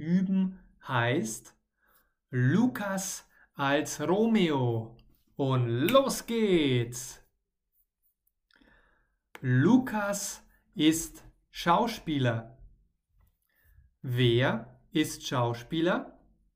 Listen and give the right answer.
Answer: Lukas, genau. Lukas ist Schauspieler.